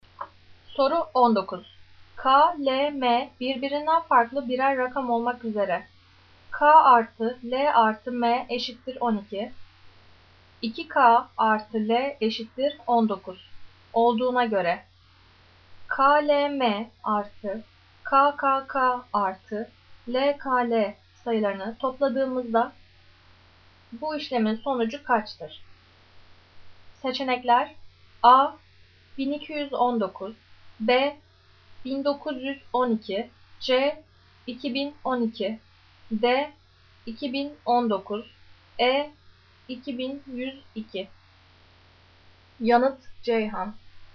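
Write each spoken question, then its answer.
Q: K, L, M artı K, K, K artı L, K, L sayılarını topladığımızda bu işlemin sonucu kaçtır?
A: E: 2102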